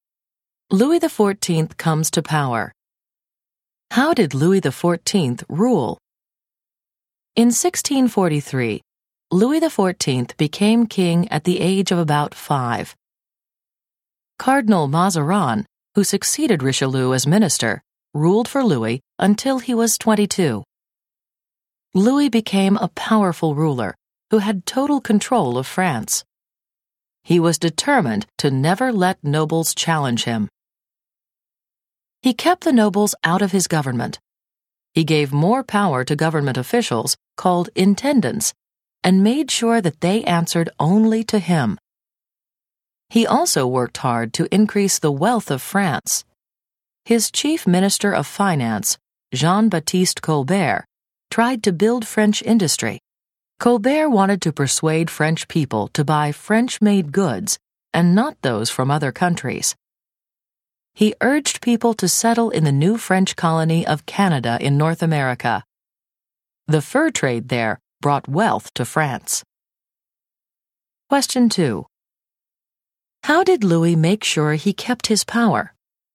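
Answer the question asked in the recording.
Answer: He kept the nobles out of his government and gave power to intendants who answered only to him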